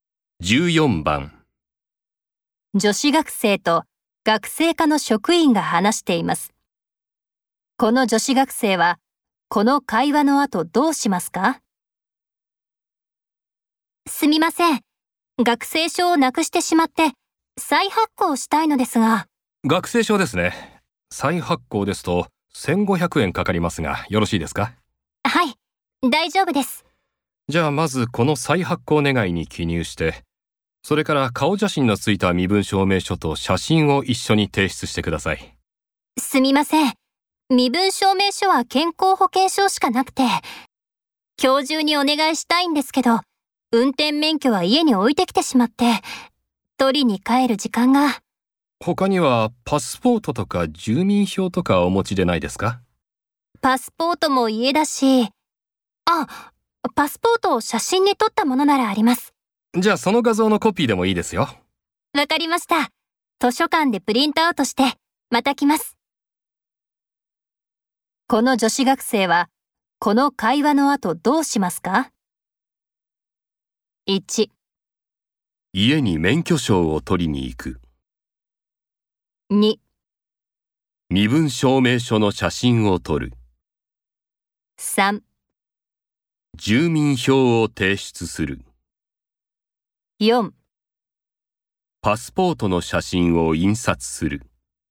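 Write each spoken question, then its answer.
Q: この女子学生はこの会話の後どうしますか?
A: 4: パスポートの写真を印刷する。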